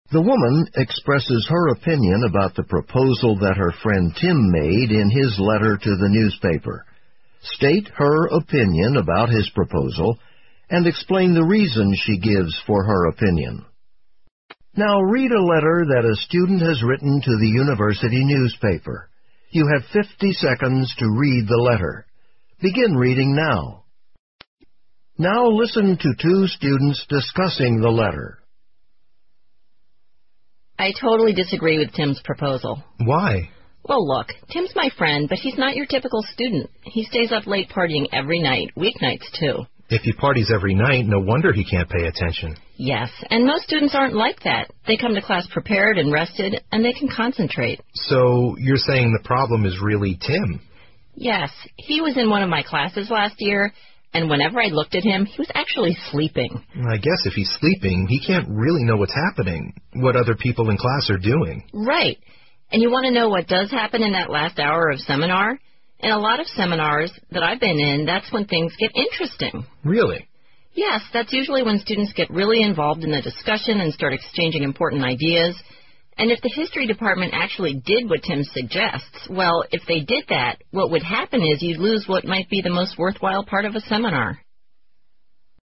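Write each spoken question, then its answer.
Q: State her opinion about his proposal and explain the reason she gives for her opinion.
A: She disagrees with Tim's proposal. Tim isn't a typical student: he parties every night and sleeps in class, while most students come rested and can concentrate. Also, the last hour of a seminar is often the most worthwhile part, when students get involved and exchange important ideas.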